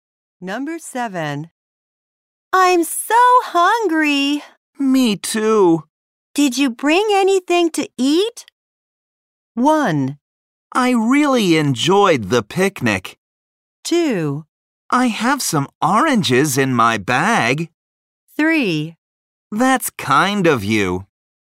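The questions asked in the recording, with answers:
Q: Did you bring anything to eat?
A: 2: I have some oranges in my bag.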